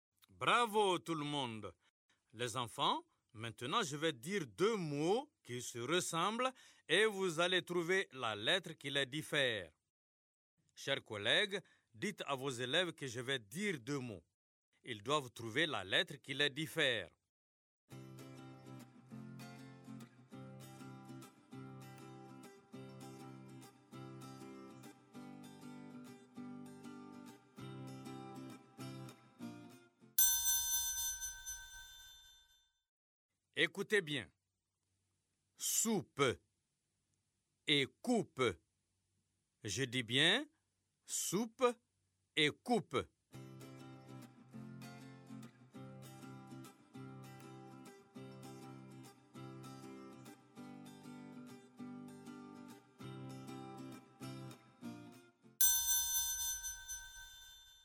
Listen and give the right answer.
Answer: Monsieur, le S est remplacé par le C.